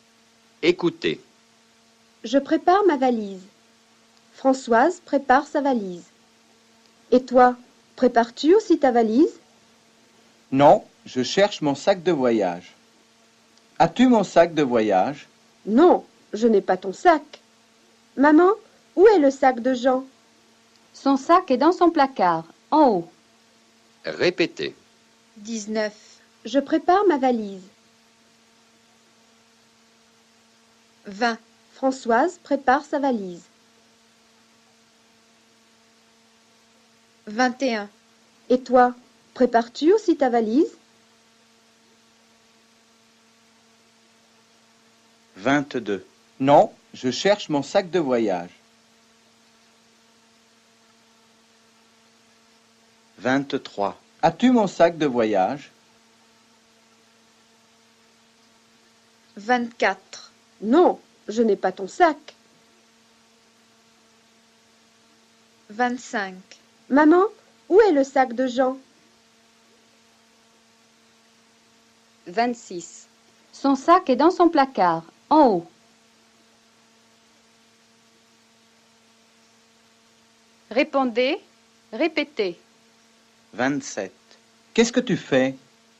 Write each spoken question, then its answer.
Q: Qu'est-ce que tu fais?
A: Je prépare ma valise.